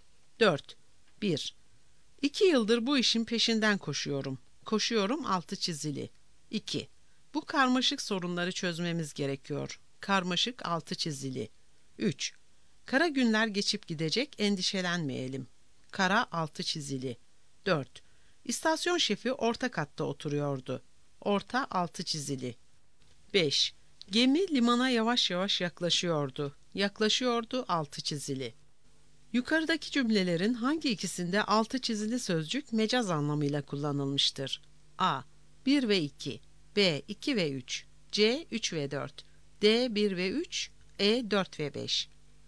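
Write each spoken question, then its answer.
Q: Yukarıdaki cümlelerin hangi ikisinde altı çizili sözcük mecaz anlamıyla kullanılmıştır?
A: D: 1 ve 3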